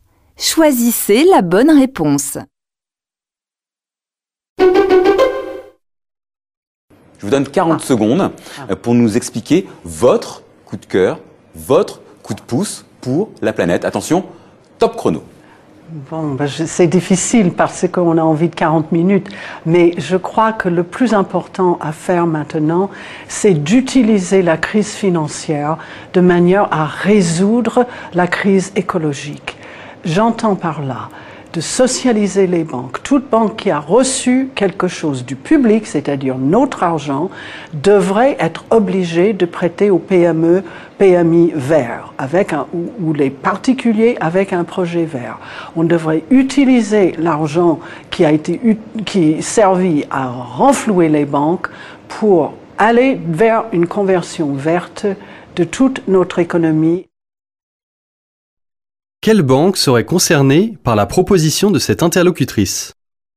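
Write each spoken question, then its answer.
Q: Quelle banque serait concernée par la proposition de cette interlocutrice ?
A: Toute banque qui a reçu de l'argent public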